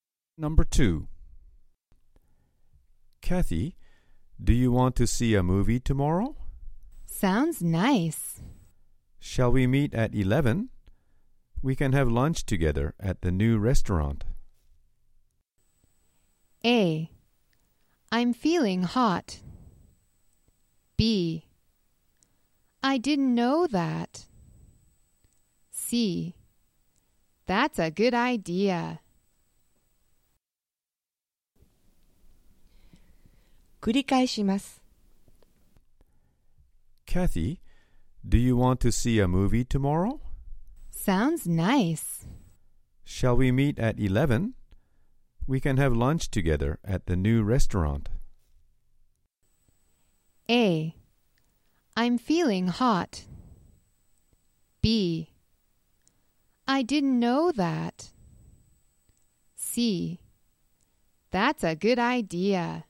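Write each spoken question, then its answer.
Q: Shall we meet at 11? We can have lunch together at the new restaurant.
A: C: That's a good idea.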